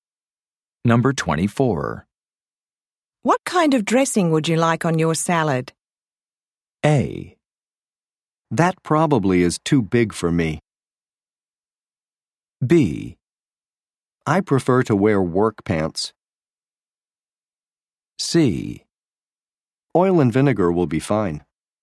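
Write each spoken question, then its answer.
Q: What kind of dressing would you like on your salad?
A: C: Oil and vinegar will be fine.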